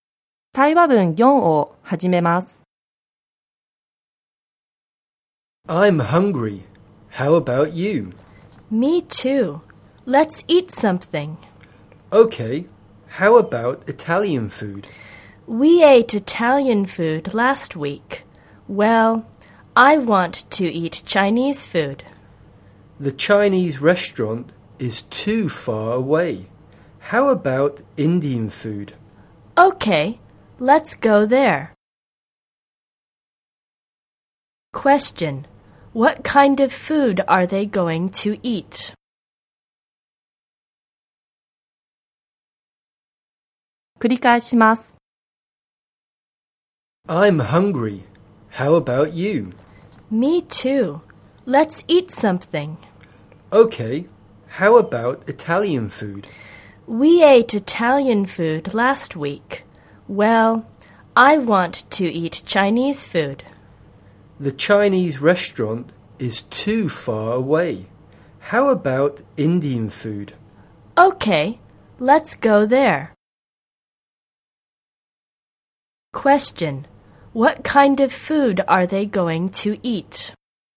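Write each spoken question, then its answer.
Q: What kind of food are they going to eat?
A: Indian food.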